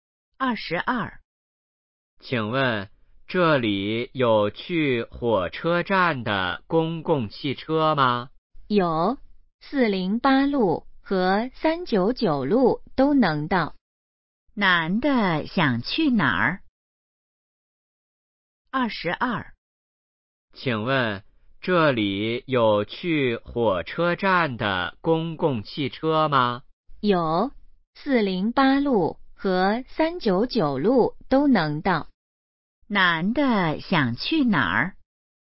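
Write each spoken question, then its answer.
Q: 男的想去哪儿?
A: 火车站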